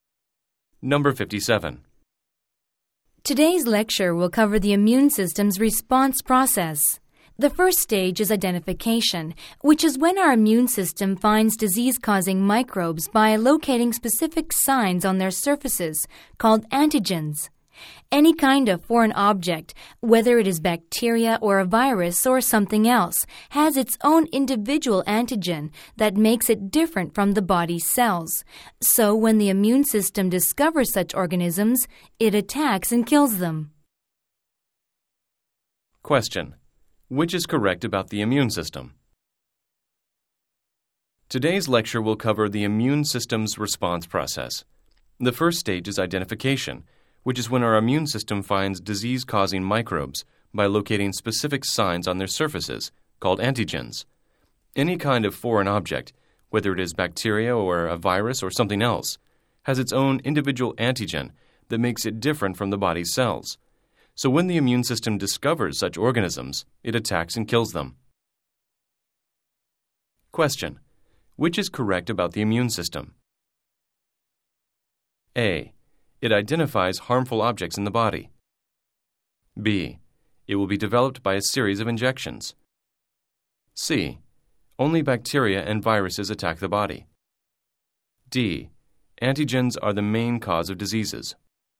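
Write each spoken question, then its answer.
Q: Which is correct about the immune system?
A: A: It identifies harmful objects in the body.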